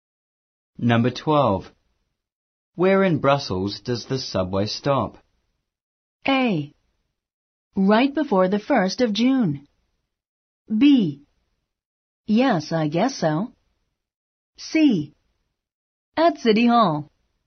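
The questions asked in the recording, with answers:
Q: Where in Brussels does the subway stop?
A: C: At City Hall.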